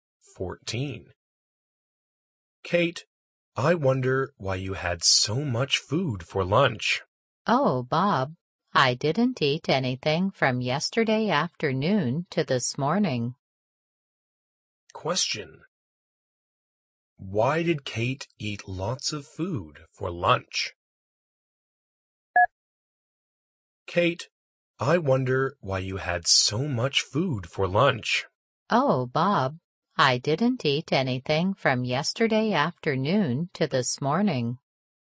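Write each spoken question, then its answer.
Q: Why did Kate eat lots of food for lunch?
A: She didn't eat anything from yesterday afternoon to this morning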